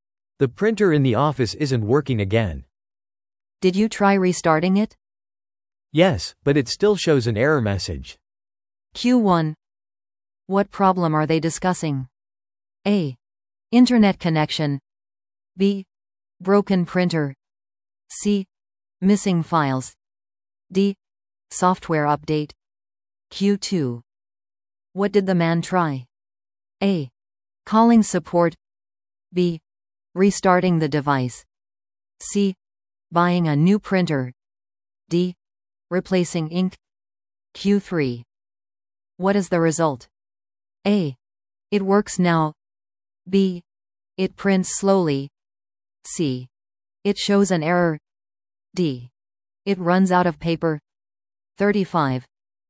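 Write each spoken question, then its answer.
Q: What problem are they discussing?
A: B: Broken printer.

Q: What did the man try?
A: B: Restarting the device.

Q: What is the result?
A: C: It shows an error.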